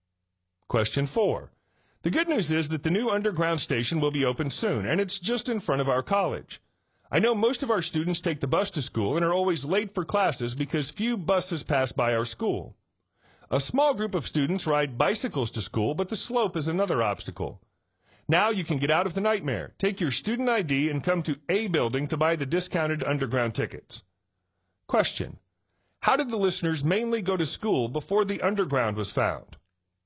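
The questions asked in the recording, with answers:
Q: How did the listeners mainly go to school before the underground was found?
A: By bus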